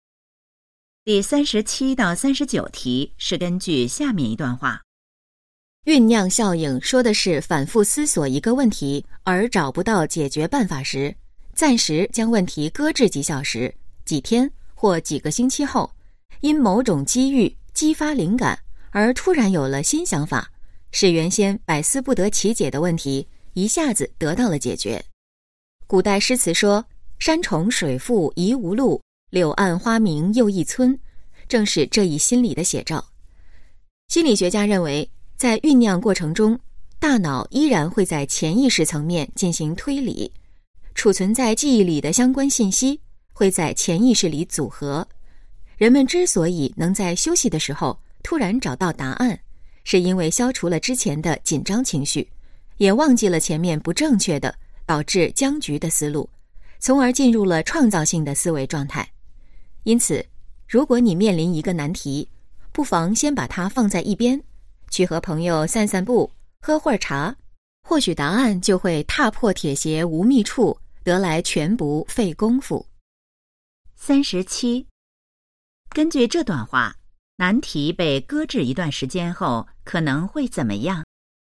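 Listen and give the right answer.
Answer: 因某种机遇激发灵感,突然有了新想法,问题得到解决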